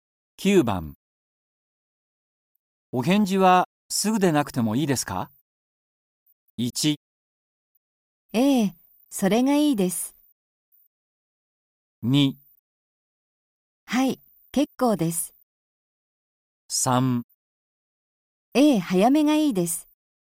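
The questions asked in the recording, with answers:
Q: お返事はすぐでなくてもいいですか?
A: 2: はい、結構です。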